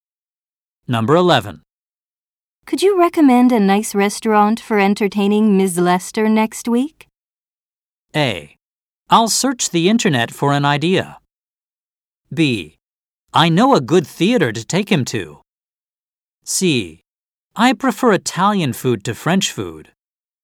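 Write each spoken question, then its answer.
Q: Could you recommend a nice restaurant for entertaining Ms.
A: A: I'll search the internet for an idea.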